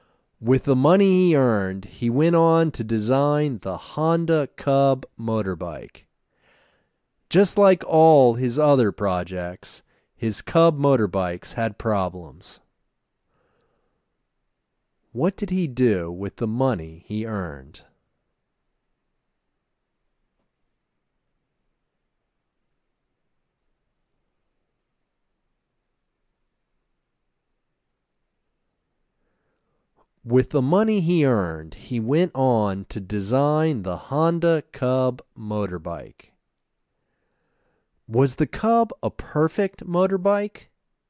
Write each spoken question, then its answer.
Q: What did he do with the money he earned?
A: With the money he earned, he went on to design the Honda Cub motorbike.

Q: Was the Cub a perfect motorbike?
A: No, the Cub wasn't a perfect motorbike.